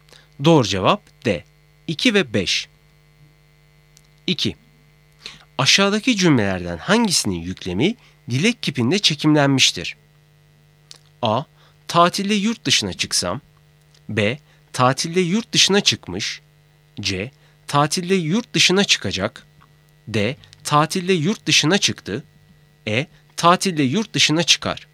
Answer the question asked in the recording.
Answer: Doğru cevap A. Tatilde yurt dışına çıksam.